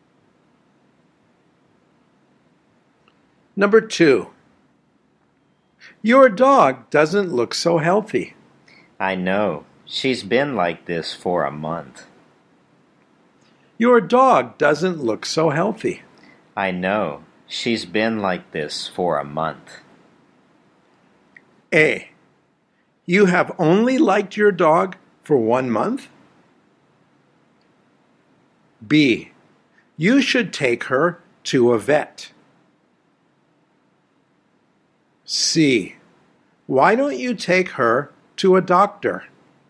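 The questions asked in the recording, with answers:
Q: Your dog doesn't look so healthy.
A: B: You should take her to a vet.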